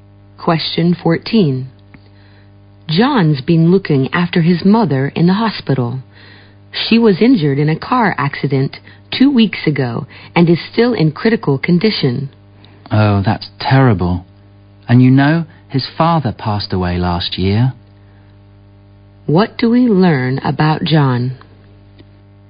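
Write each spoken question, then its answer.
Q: What do we learn about John?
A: He is caring for his badly injured mother; his father died last year.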